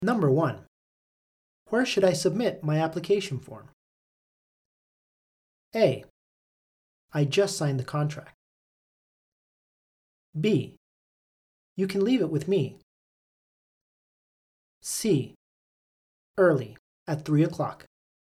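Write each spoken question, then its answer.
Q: Where should I submit my application form?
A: B: You can leave it with me.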